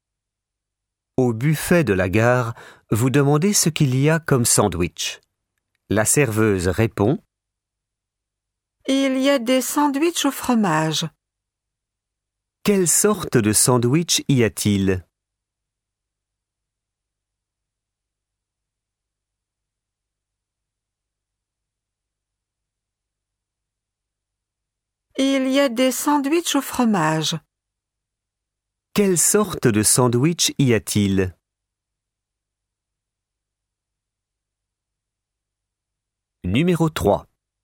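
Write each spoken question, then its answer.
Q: Quelle sorte de sandwich y a-t-il?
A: Des sandwichs au fromage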